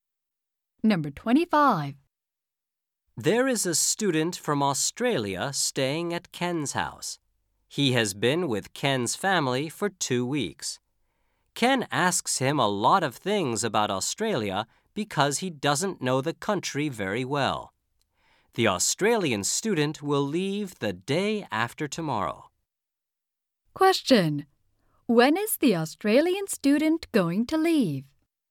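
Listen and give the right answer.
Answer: The day after tomorrow.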